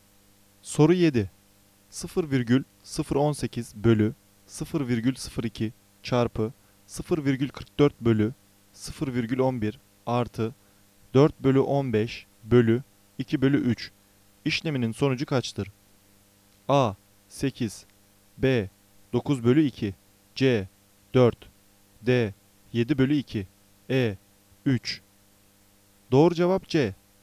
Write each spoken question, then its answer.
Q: 0,018 bölü 0,02 çarpı 0,44 bölü 0,11 artı 4 bölü 15 bölü 2 bölü 3 işleminin sonucu kaçtır?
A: Doğru cevap C. 4